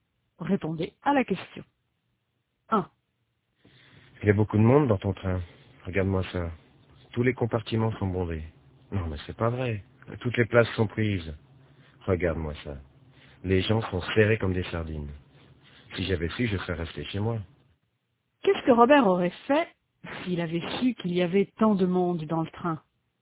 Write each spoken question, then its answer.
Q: Qu'est-ce que Robert aurait fait s'il avait su qu'il y avait tant de monde dans le train?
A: Il serait resté chez lui.